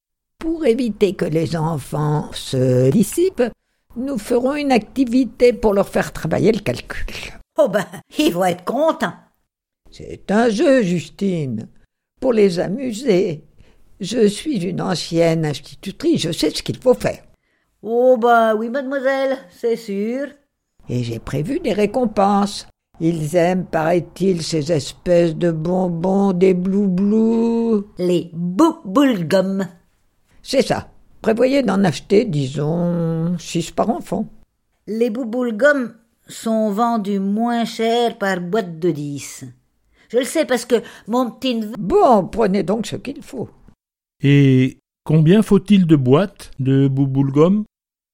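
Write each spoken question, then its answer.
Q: Et combien faut-il de boîtes de bou-boule-gum ?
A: 5 boîtes (48 bou-boule-gum)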